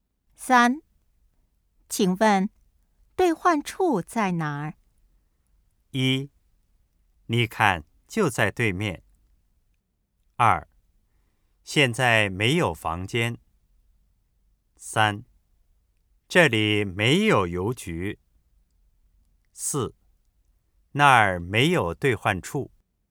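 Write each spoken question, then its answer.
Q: 请问兑换处在哪儿?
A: 一: 你看就在对面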